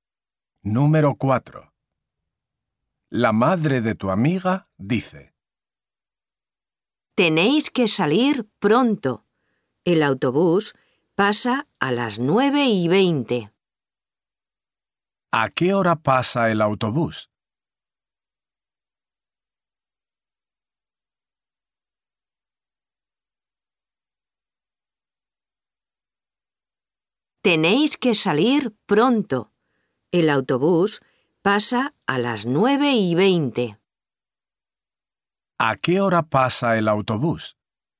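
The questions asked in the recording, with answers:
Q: ¿A qué hora pasa el autobús?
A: a las 9:20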